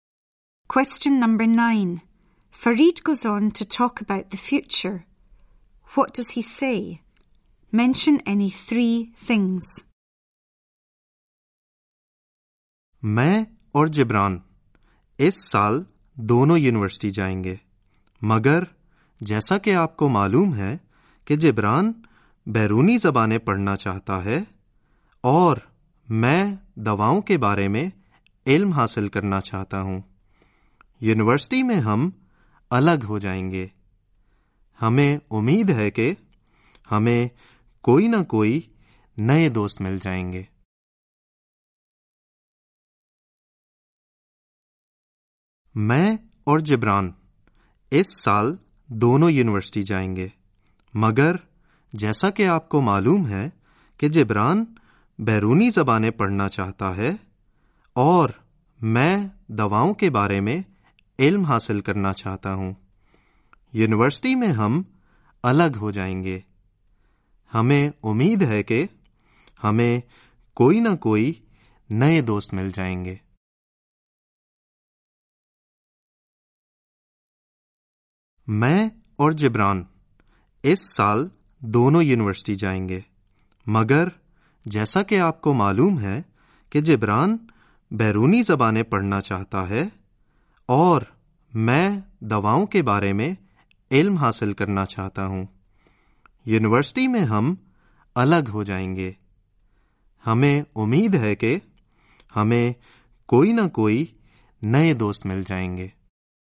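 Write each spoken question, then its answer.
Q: Fareed goes on to talk about the future. What does he say? Mention any three things.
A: Both go to university this year; Jibran will study foreign languages, Fareed medicine; they will be separated at university; hope to make new friends (any three)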